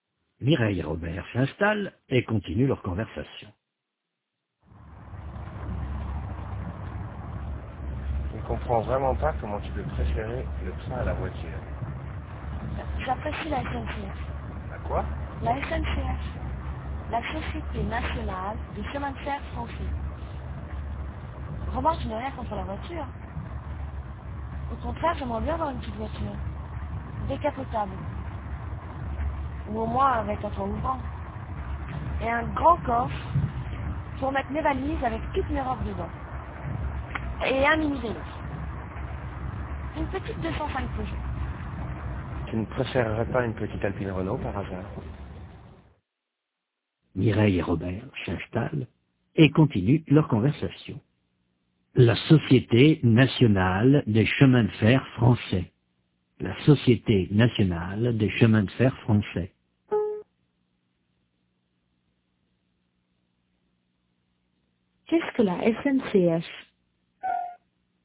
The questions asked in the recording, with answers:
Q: Qu'est-ce que la SNCF?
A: La Société Nationale des Chemins de Fer Français.